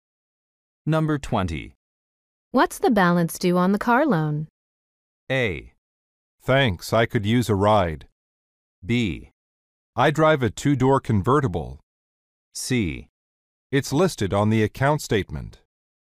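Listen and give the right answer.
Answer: C: It's listed on the account statement.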